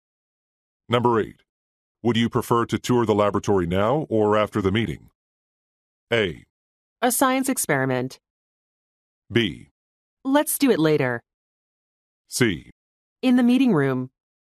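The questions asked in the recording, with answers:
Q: Would you prefer to tour the laboratory now or after the meeting?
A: B: Let's do it later.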